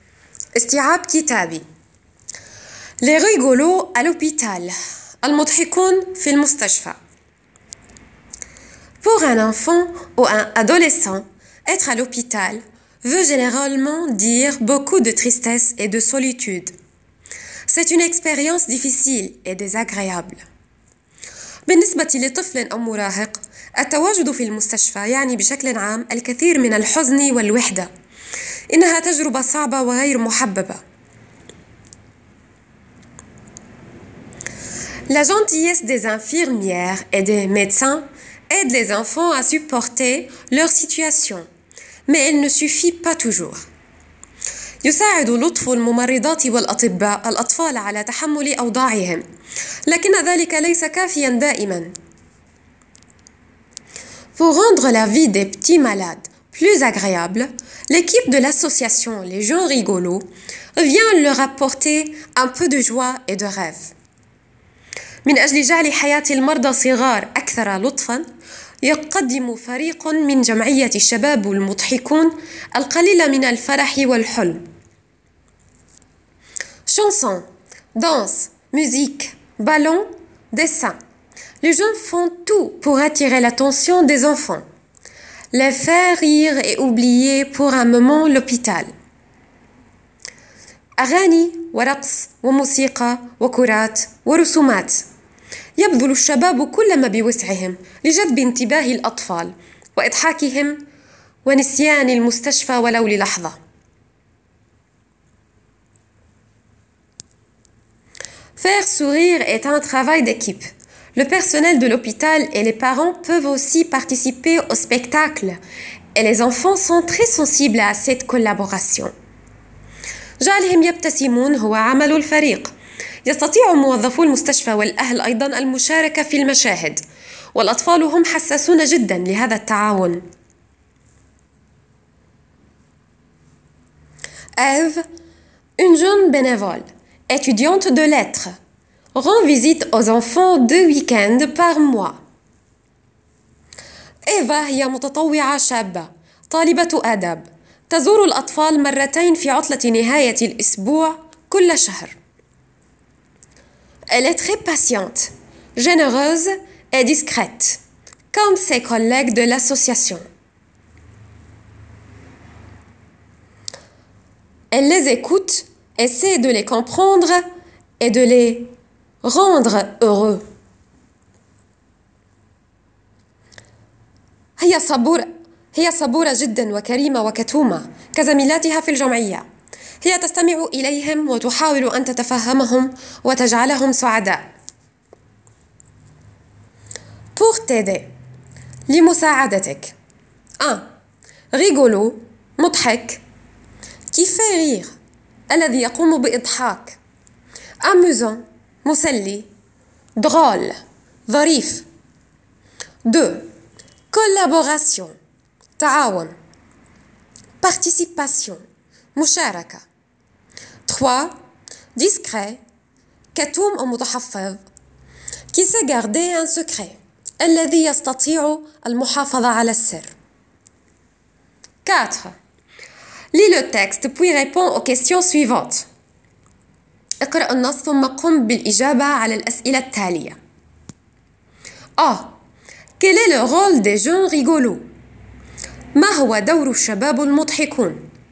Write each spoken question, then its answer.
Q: Quel est le rôle des jeunes rigolos.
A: Rendre la vie des petits malades plus agréable et leur apporter un peu de joie et de rêve.